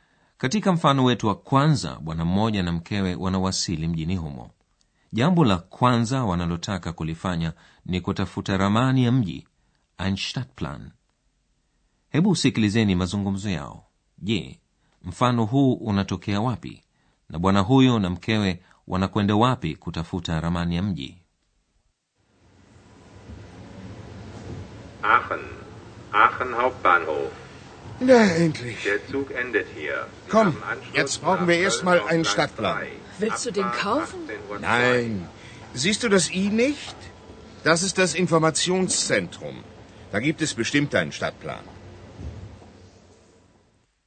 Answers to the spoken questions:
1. Kama kwenye vituo vingi vya treni nchini Ujerumani, nacho hicho cha Aachen kina afisi ya habari
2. ambako watu wanaweza kujipatia ramani ya mji